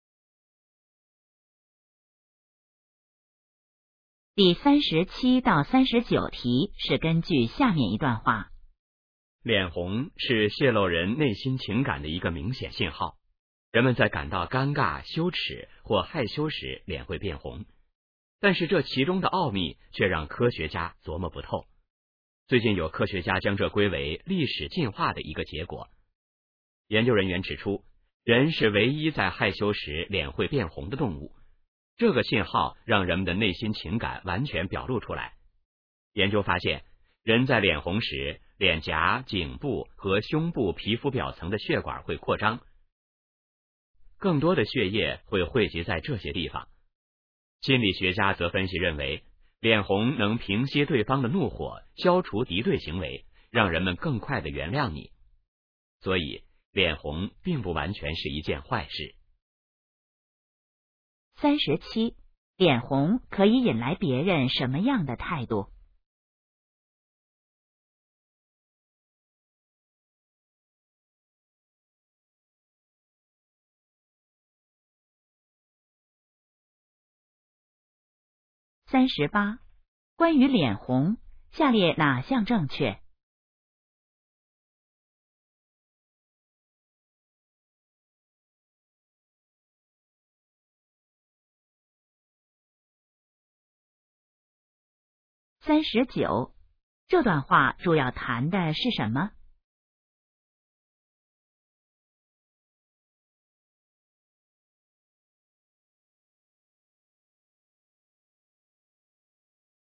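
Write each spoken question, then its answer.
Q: 脸红可以引来别人什么样的态度?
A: 更快地原谅你

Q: 这段话主要谈的是什么?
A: 脸红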